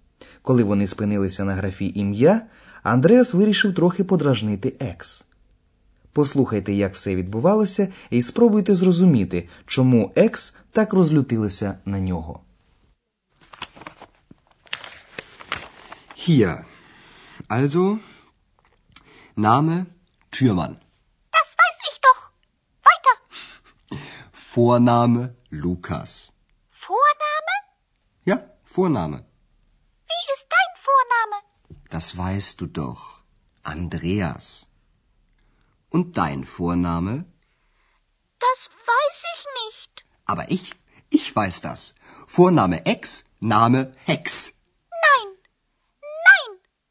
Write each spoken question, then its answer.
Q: Послухайте, як все відбувалося, і спробуйте зрозуміти, чому екс так розлютилася на нього.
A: Екс розлютилася на Андреаса через те, що він вигадав для неї прізвисько Гекс, яке дуже нагадує слово гексе, тобто відьма.